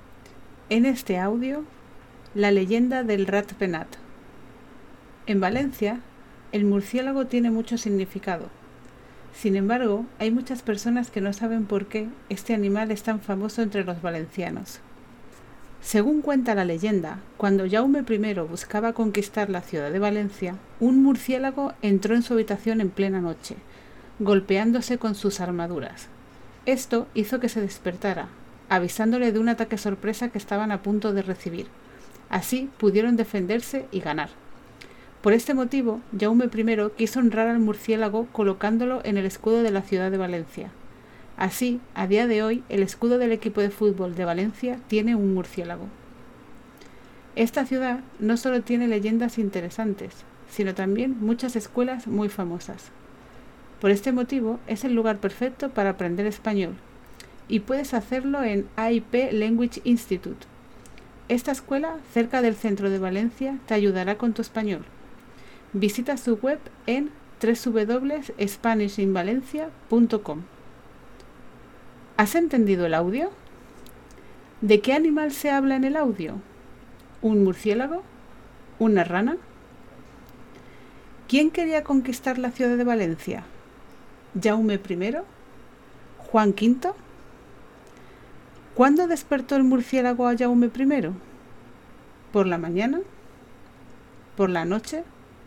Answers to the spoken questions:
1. un murciélago
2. hume primero
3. por la noche